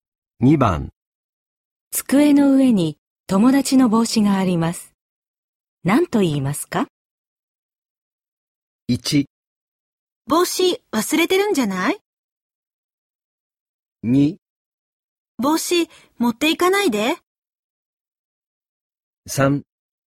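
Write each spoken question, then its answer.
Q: 机の上に友達の帽子があります。何と言いますか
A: 1: 帽子忘れてるんじゃない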